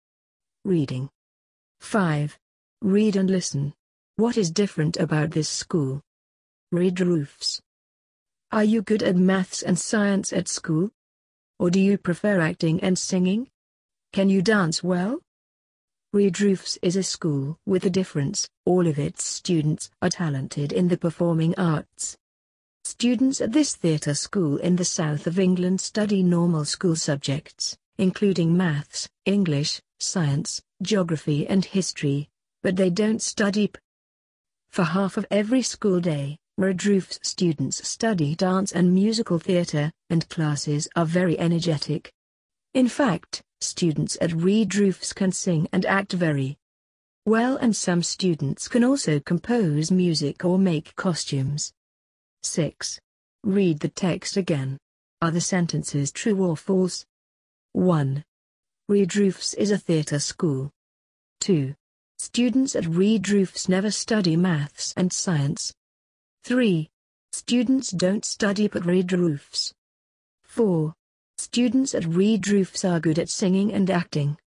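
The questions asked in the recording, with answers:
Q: What is different about this school?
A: It is a theatre school; all its students are talented in the performing arts.

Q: Red Roofs is a theatre school.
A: True

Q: Students at Red Roofs never study maths and science.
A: False

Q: Students at Red Roofs are good at singing and acting.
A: True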